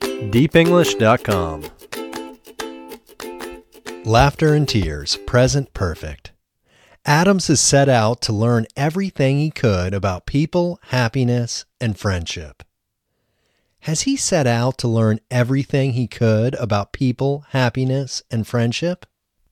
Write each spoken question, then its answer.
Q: Has he set out to learn everything he could about people, happiness, and friendship?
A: Yes, he has set out to learn everything he could about people, happiness, and friendship.